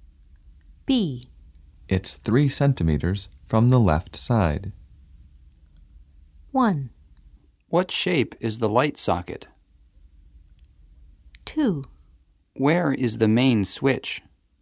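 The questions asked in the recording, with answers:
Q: It's 3 centimeters from the left side.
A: 2: Where is the main switch?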